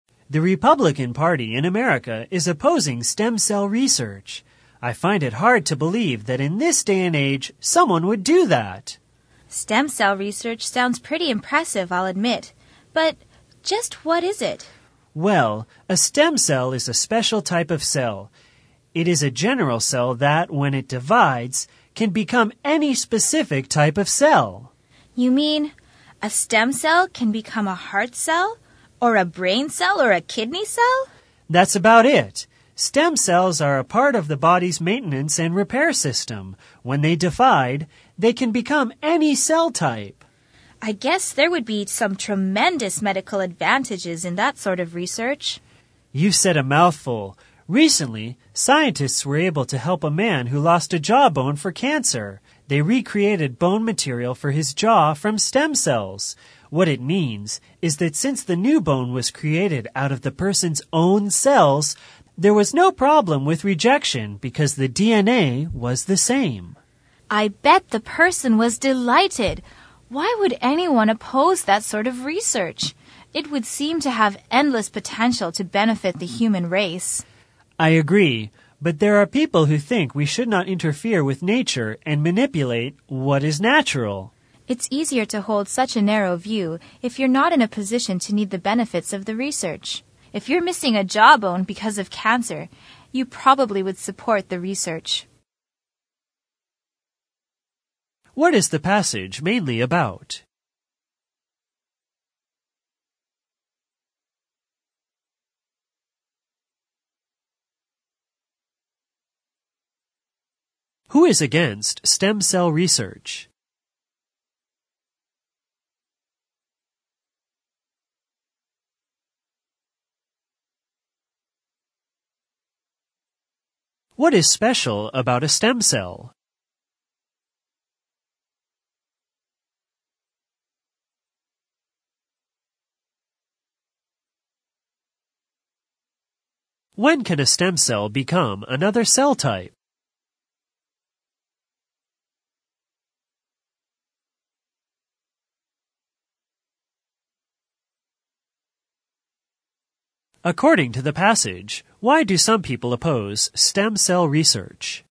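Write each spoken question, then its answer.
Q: What is the passage mainly about?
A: Stem cell research

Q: Who is against stem cell research?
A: The Republican Party in America

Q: What is special about a stem cell?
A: When it divides it can become any specific type of cell

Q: When can a stem cell become another cell type?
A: When it divides

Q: According to the passage, why do some people oppose stem cell research?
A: They think we should not interfere with nature and manipulate what is natural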